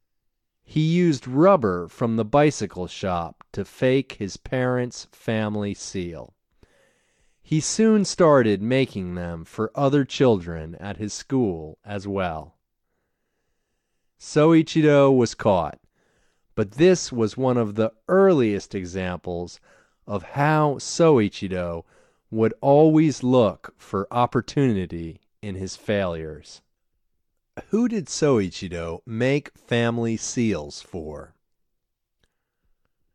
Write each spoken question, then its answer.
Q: Who did Soichiro make family seals for?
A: Soichiro made family seals for other children at school.